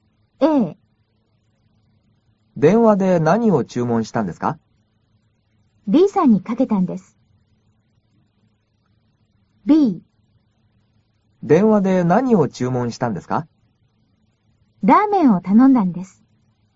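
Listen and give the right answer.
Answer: B: ラーメンを頼んだんです。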